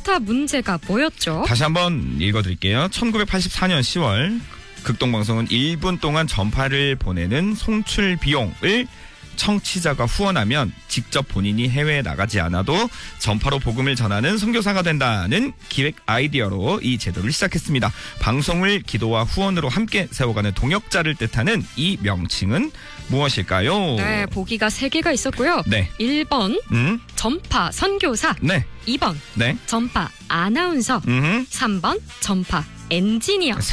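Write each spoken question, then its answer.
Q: 방송을 기도와 후원으로 함께 세워가는 동역자를 뜻하는 이 명칭은 무엇일까요?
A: 1번: 전파 선교사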